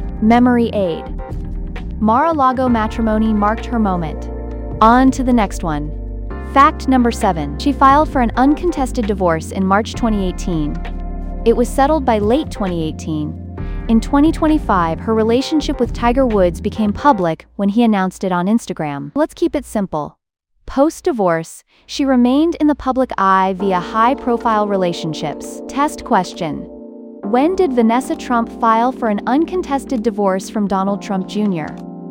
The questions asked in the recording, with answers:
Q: When did Vanessa Trump file for an uncontested divorce from Donald Trump Jr.?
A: March 2018.